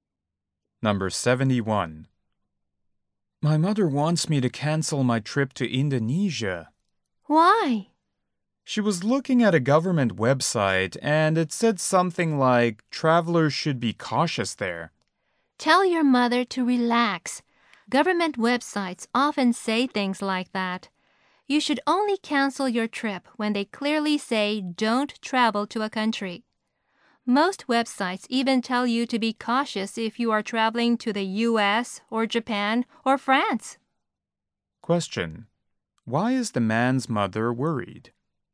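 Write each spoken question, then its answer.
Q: Why is the man's mother worried?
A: A government website said travelers should be cautious in Indonesia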